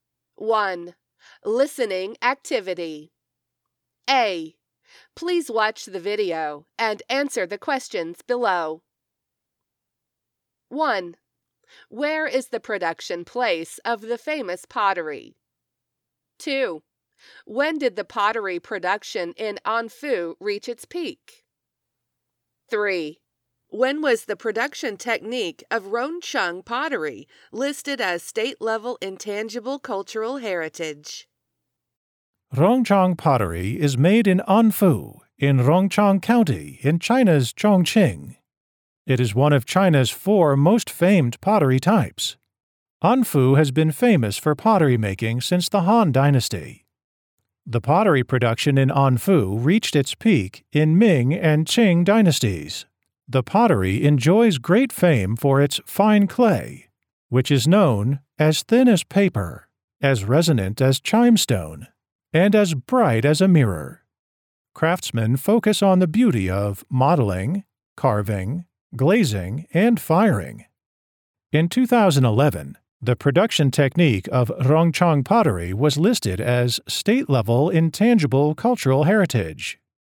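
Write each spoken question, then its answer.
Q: Where is the production place of the famous pottery?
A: Anfu in Rongcheng County in China's Chongqing

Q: When did the pottery production in Anfu reach its peak?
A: In the Ming and Qing dynasties

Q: When was the production technique of Rongcheng pottery listed as state-level intangible cultural heritage?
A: In 2011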